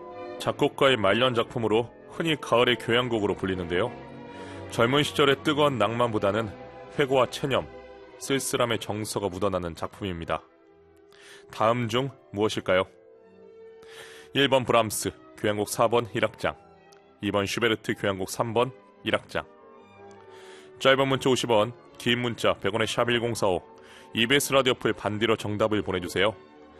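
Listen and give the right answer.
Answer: 1번: 브람스, 교향곡 4번 1악장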